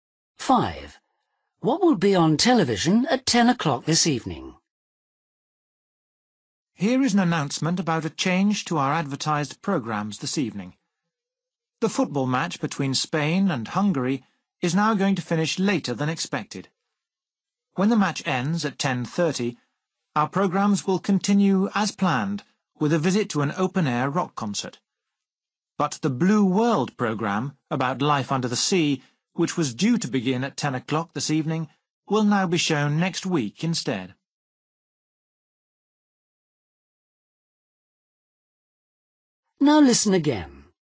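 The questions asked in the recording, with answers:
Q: What will be on television at 10 o'clock this evening?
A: the football match (Spain v Hungary)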